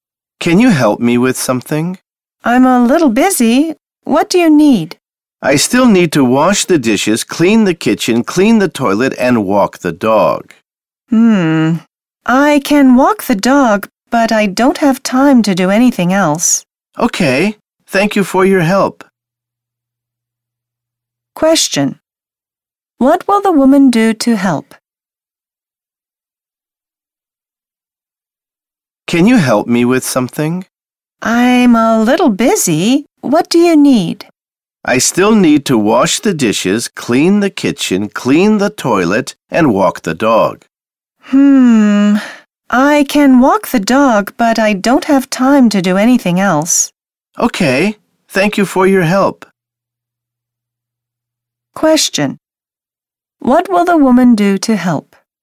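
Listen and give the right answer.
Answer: Walk the dog.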